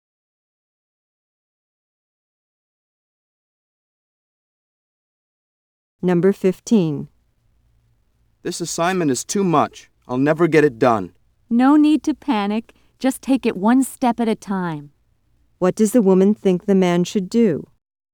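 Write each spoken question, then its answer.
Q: What does the woman think the man should do?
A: Work on the assignment one step at a time.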